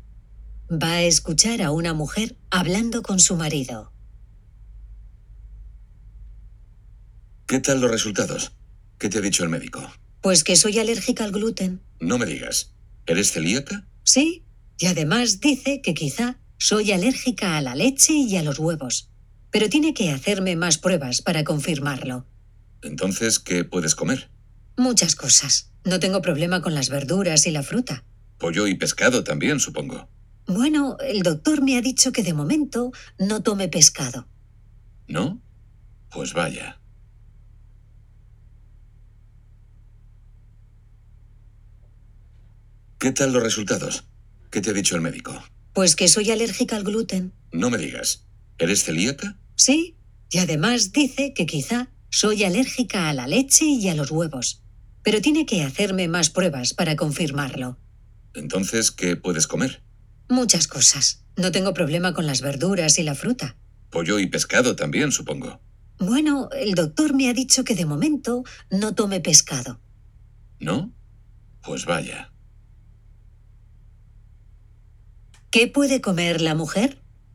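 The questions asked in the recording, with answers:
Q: ¿Qué puede comer la mujer?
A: Verduras, fruta y pollo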